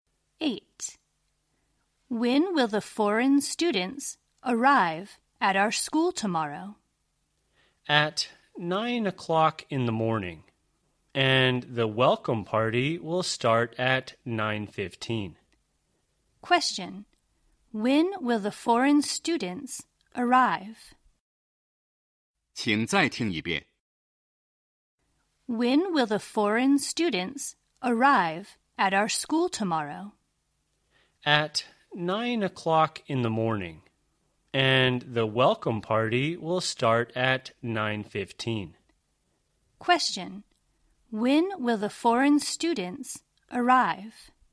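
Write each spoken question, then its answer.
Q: When will the foreign students arrive?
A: At 9 o'clock in the morning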